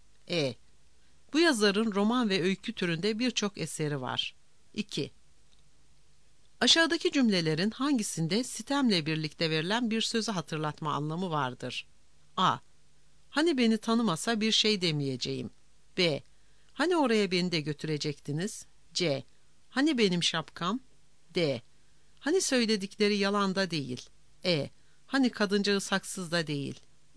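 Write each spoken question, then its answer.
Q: Aşağıdaki cümlelerin hangisinde sitemle birlikte verilen bir sözü hatırlatma anlamı vardır?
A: B: Hani oraya beni de götürecektiniz?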